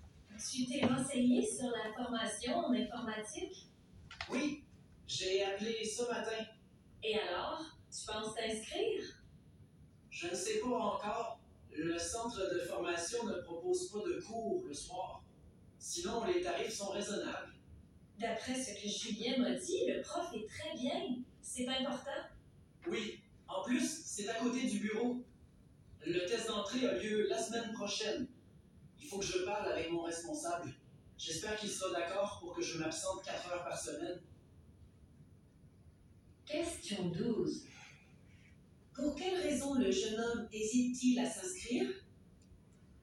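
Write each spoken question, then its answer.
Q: Pour quelle raison le jeune homme hésite-t-il à s'inscrire?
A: Le centre de formation ne propose pas de cours le soir.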